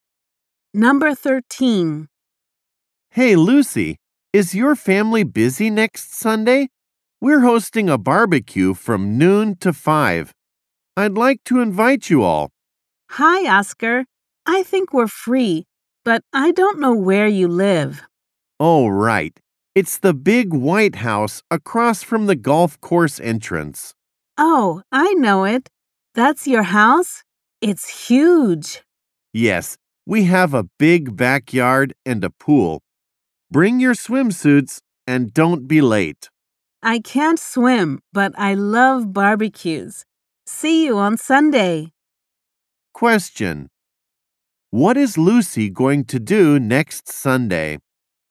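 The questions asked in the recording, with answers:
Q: What is Lucy going to do next Sunday?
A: Go to Oscar's barbecue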